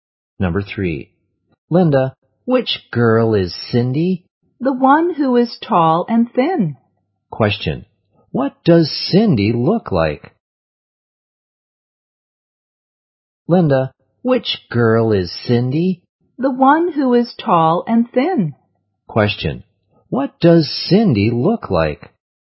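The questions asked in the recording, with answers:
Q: What does Cindy look like?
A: Tall and thin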